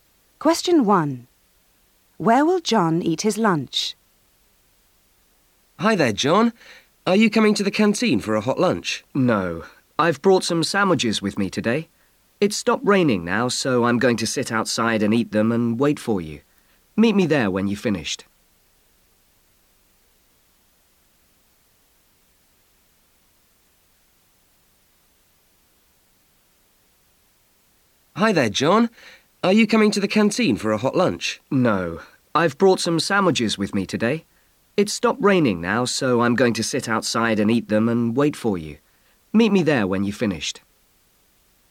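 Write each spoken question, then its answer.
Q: Where will John eat his lunch?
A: Outside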